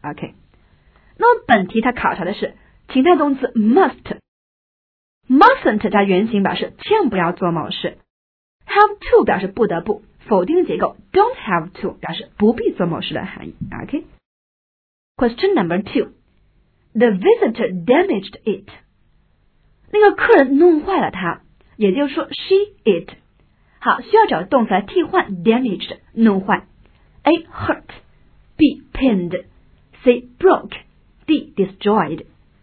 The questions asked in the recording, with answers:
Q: The visitor damaged it.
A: OK, 那我们答案选择是 C, She broke it.